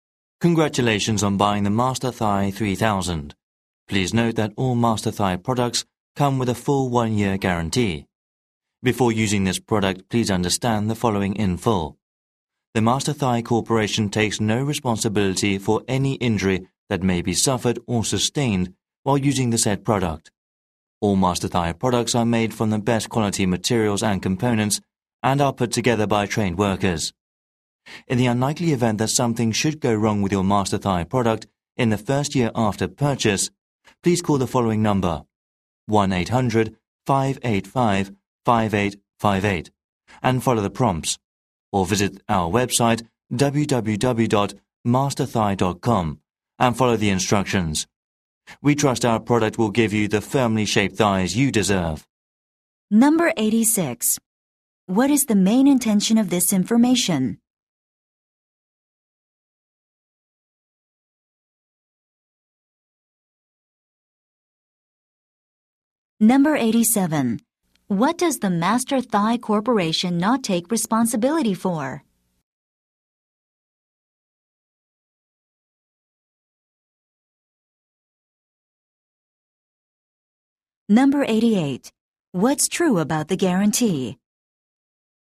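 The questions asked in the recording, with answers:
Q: What does the Master Thigh Corporation not take responsibility for?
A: Any injury suffered while using the product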